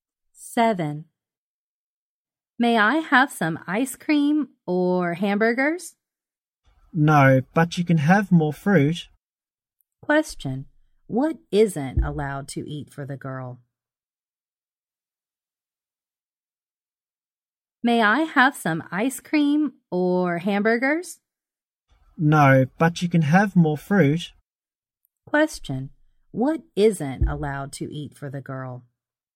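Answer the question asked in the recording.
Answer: Ice cream or hamburgers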